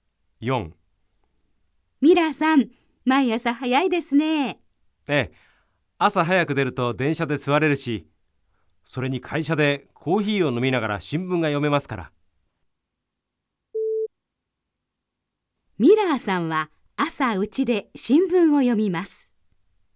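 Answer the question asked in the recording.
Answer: ×(正しくない)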